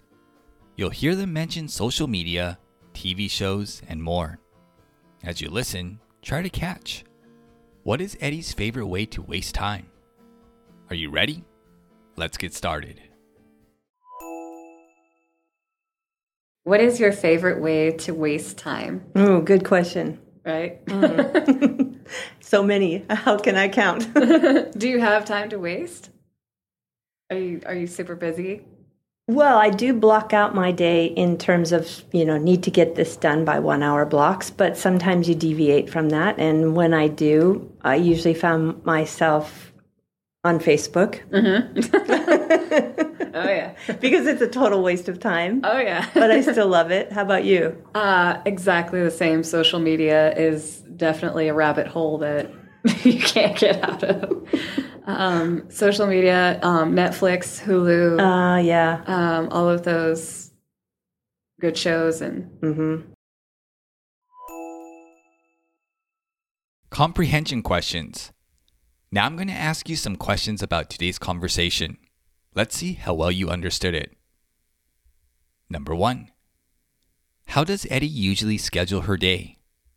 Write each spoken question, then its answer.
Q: how does Eddie usually schedule her day?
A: She blocks out her day in 1 hour blocks.